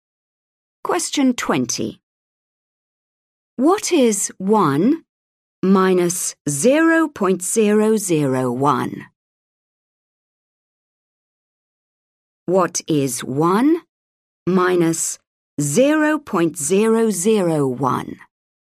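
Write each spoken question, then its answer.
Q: What is 1 minus 0.001?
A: 0.999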